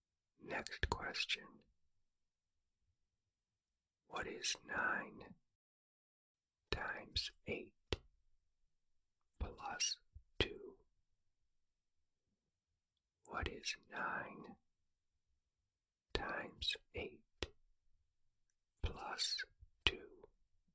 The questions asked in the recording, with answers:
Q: What is 9 times 8 plus 2?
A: The answer is 74.